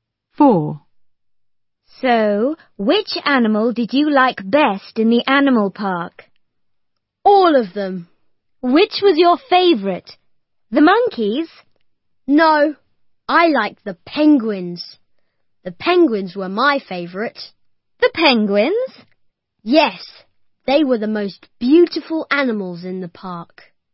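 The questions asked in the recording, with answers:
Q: So, which animal did you like best in the animal park?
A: penguins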